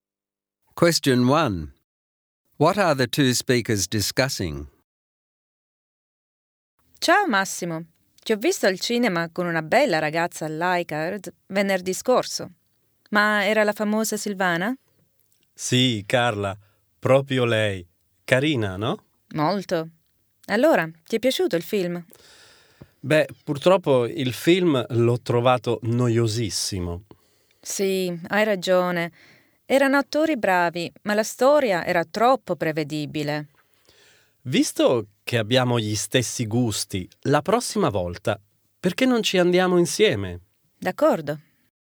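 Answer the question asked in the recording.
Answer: The film Massimo saw with Silvana last Friday: both found it boring and predictable despite good actors, and they agree to go to the cinema together next time.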